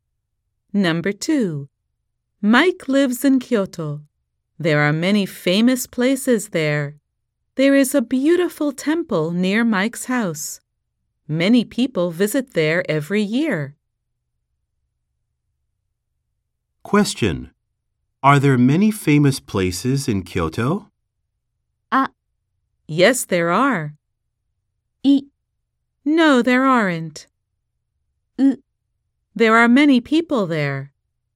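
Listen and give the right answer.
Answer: ア: Yes, there are.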